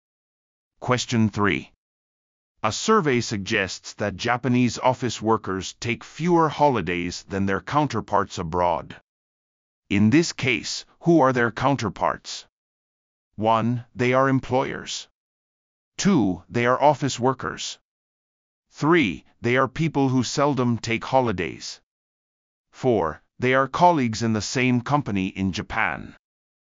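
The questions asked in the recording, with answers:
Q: In this case, who are their counterparts?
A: 2: They are office workers.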